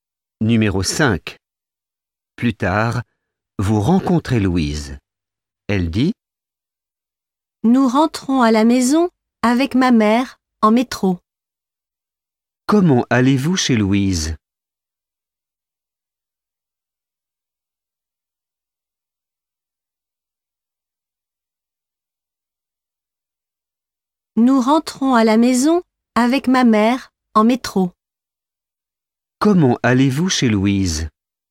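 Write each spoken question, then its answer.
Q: Comment allez-vous chez Louise ?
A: En métro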